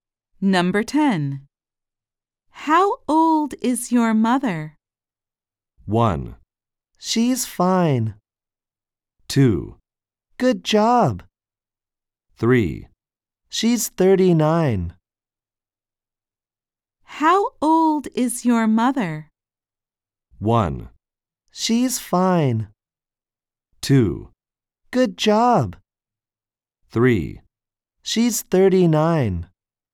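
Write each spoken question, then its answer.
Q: How old is your mother?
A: 3: She's 39.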